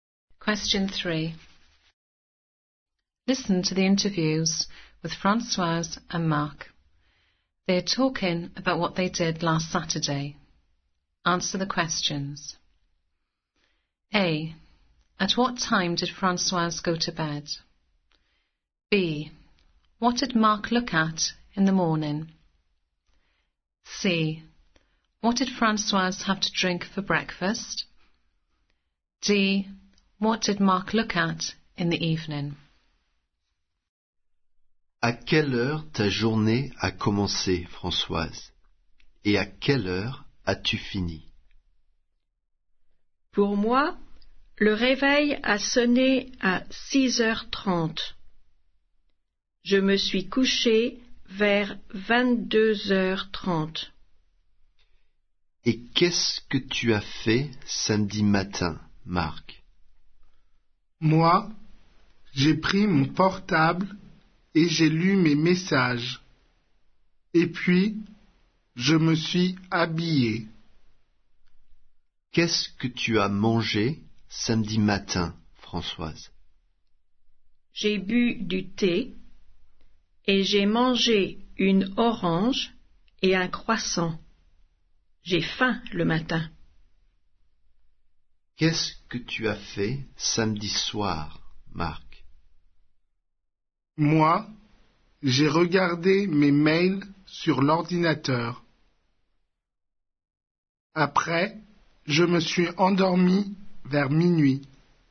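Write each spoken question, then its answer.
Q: At what time did Françoise go to bed?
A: Around 10:30 pm

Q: What did Marc look at in the morning?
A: The messages on his mobile phone

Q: What did Françoise have to drink for breakfast?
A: Tea

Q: What did Marc look at in the evening?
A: His emails on the computer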